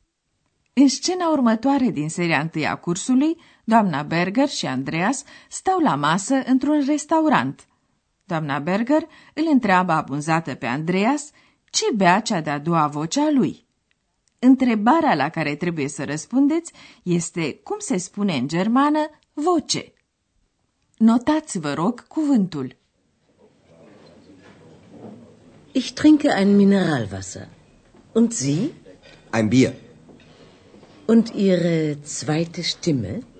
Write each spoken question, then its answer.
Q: Întrebarea la care trebuie să răspundeți este cum se spune în germană voce.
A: Este Stimme.